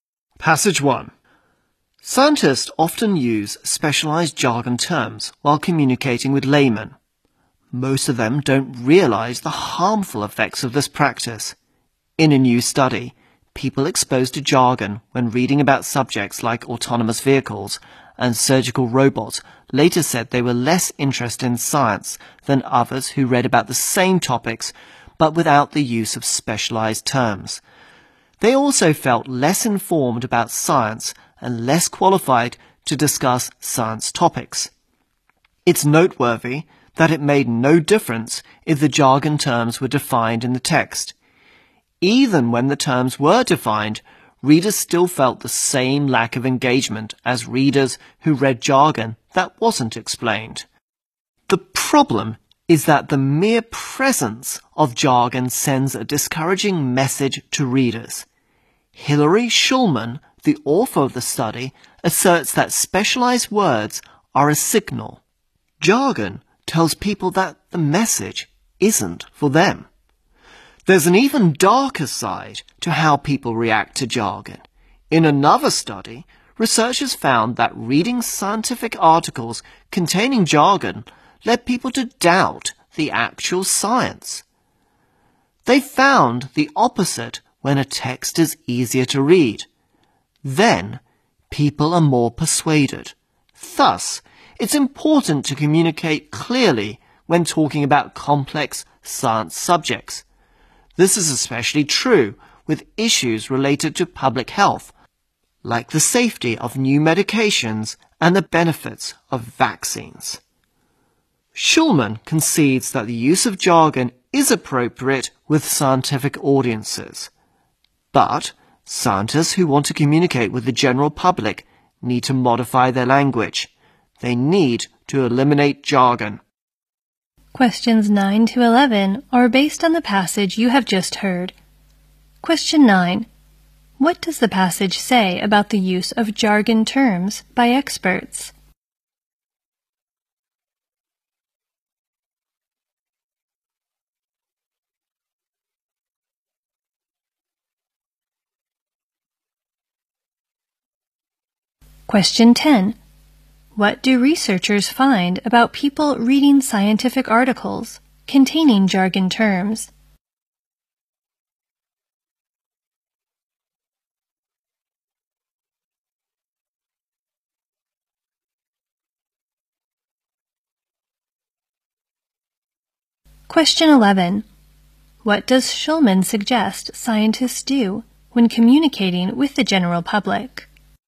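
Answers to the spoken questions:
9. It makes readers less interested in science, even when the terms are defined
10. They come to doubt the actual science
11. Cut out jargon and change their language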